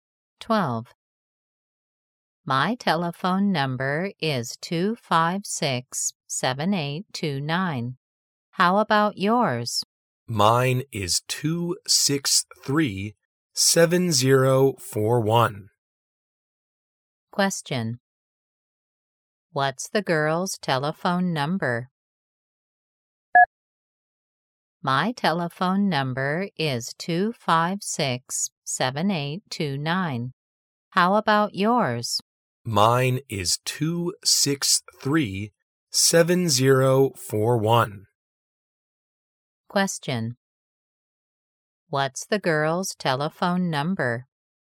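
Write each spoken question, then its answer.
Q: What's the girl's telephone number?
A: 263-7041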